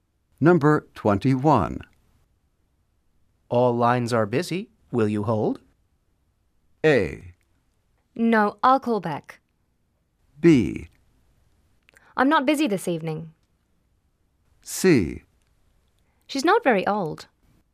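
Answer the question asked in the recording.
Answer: A: No, I'll call back.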